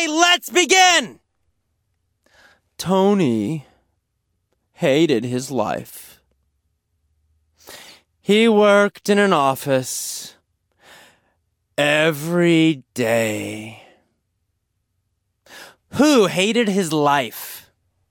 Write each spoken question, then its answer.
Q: Who hated his life?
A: Tony. Tony hated his life.